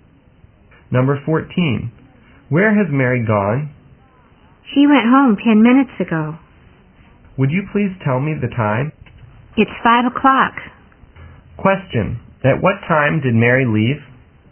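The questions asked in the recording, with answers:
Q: At what time did Mary leave?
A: At 4:50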